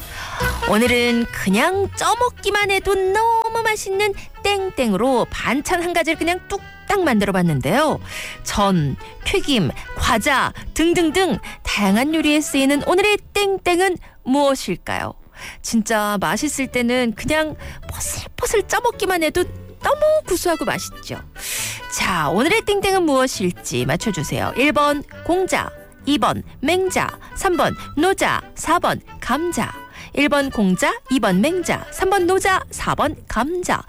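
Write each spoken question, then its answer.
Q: 자, 오늘의 땡땡은 무엇일지 맞춰주세요.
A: 4번: 감자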